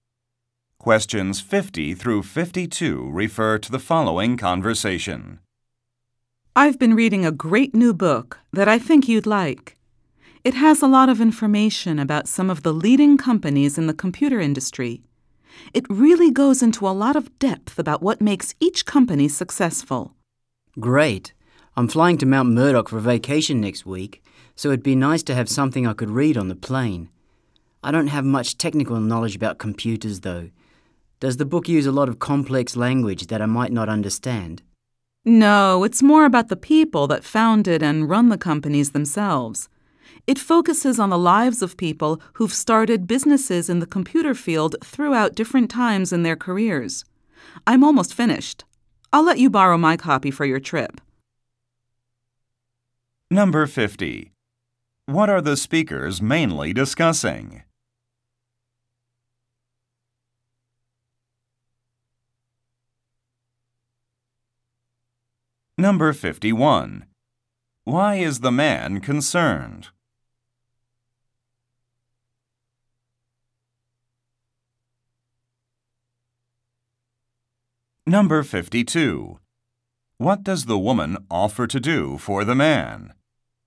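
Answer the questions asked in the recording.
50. A book about computer companies
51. The book might use technical language he won't understand
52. Lend him her copy of the book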